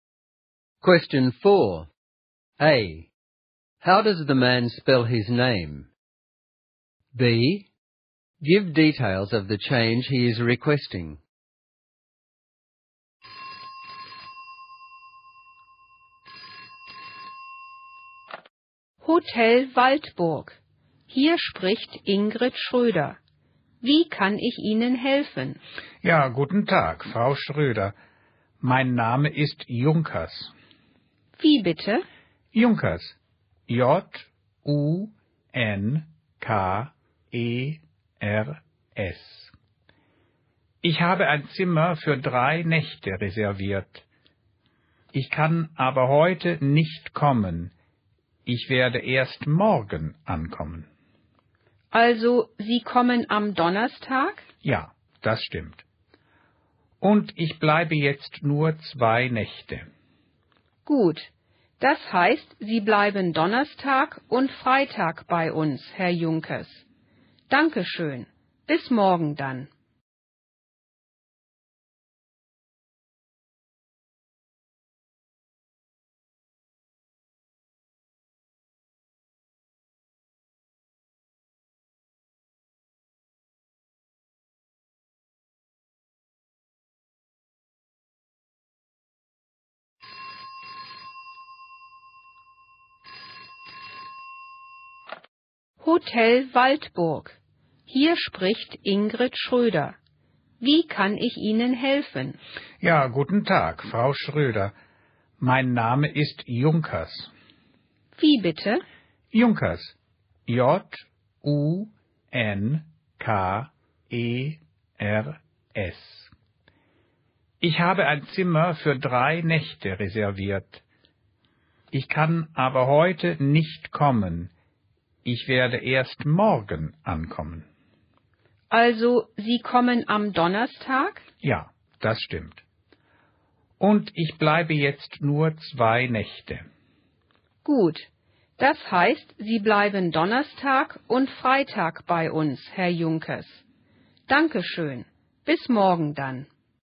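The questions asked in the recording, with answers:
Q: A. How does the man spell his name?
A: J-U-N-K-E-R-S

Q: B. Give details of the change he is requesting.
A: He will arrive tomorrow (Thursday) instead of today and stay only 2 nights (Thursday and Friday) instead of 3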